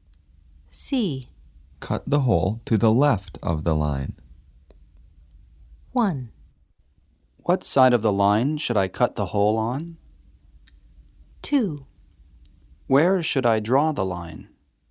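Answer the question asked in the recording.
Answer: 1: What side of the line should I cut the hole on?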